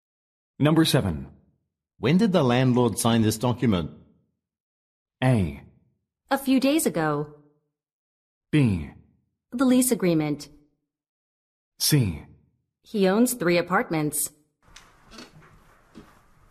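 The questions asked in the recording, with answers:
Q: When did the landlord sign this document?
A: A: A few days ago.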